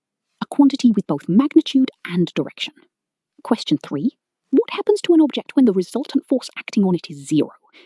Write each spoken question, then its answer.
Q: what happens to an object when the resultant force acting on it is zero?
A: It remains stationary or continues at constant velocity, no change in motion.